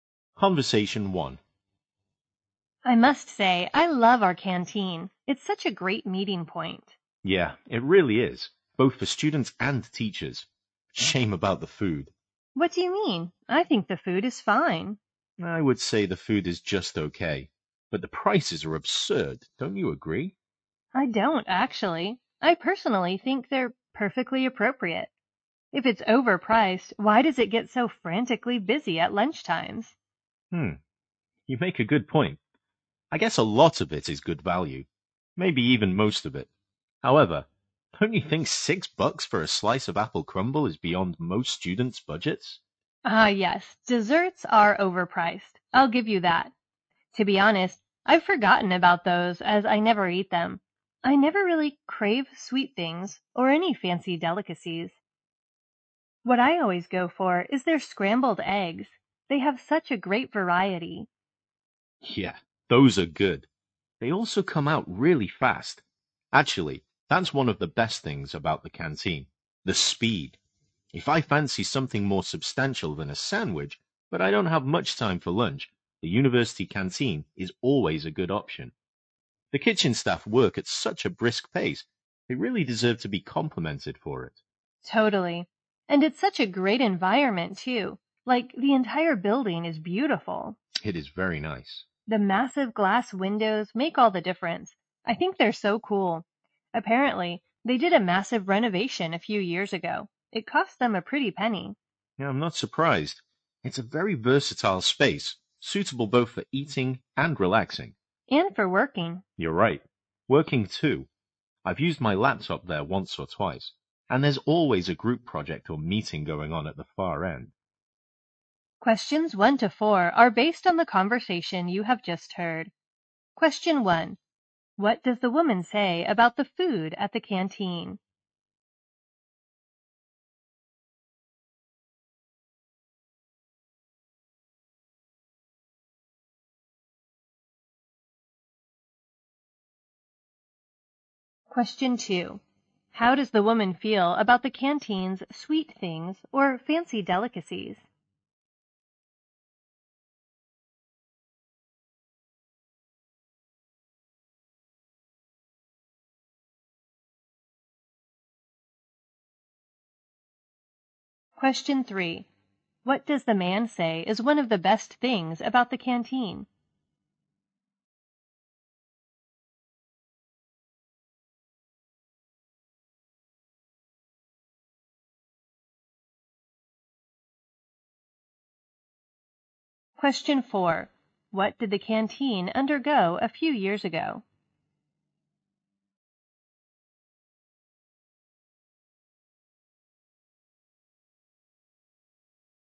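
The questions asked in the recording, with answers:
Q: What did the canteen undergo a few years ago?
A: A massive, costly renovation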